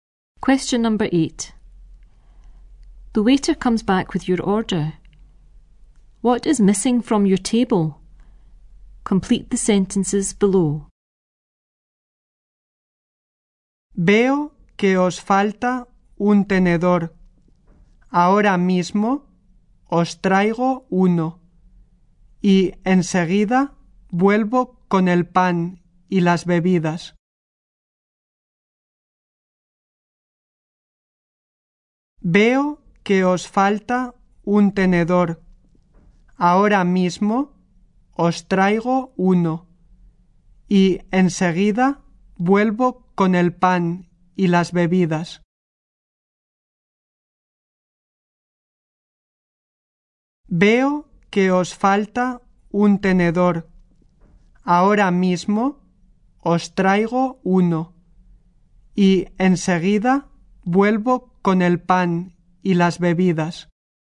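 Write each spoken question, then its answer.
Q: What is missing from your table?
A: A fork (and the bread and drinks)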